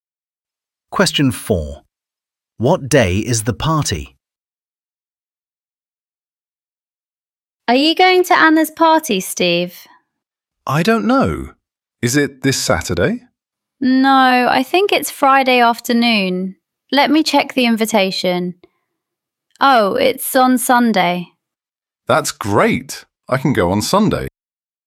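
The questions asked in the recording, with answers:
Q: What day is the party?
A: Sunday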